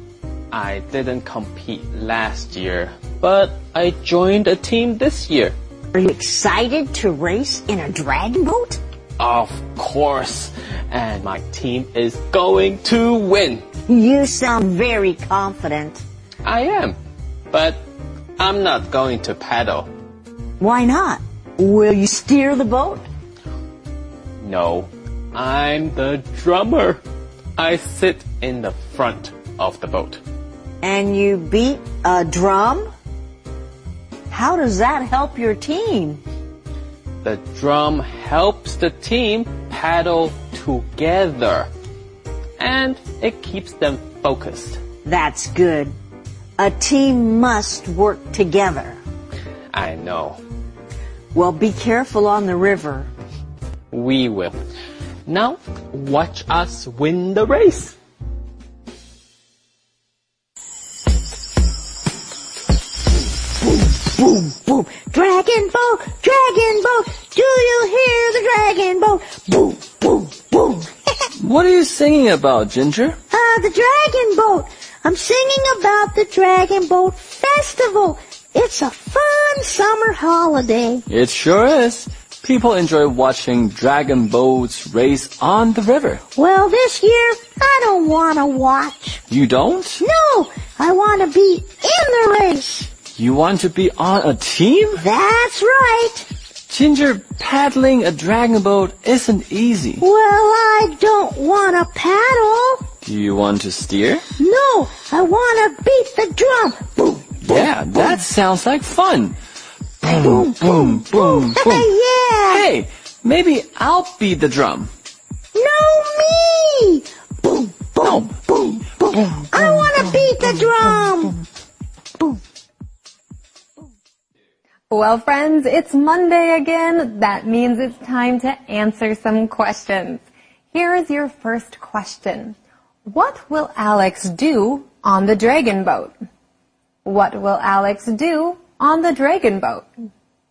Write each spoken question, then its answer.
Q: What will Alex do on the dragon boat?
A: He is the drummer. He will beat a drum to help his team paddle together.